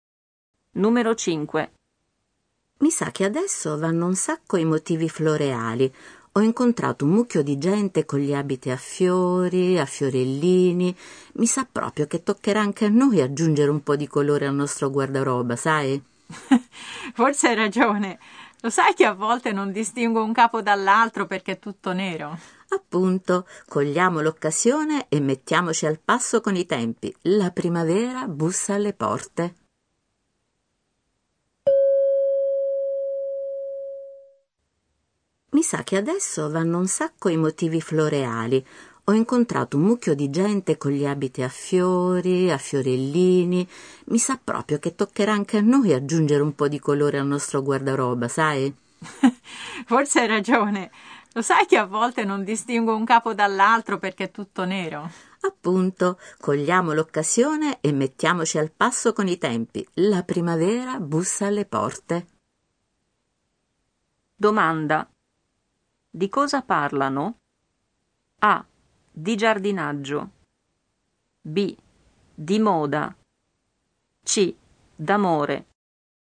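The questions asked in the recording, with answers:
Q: Domanda. Di cosa parlano?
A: B: Di moda.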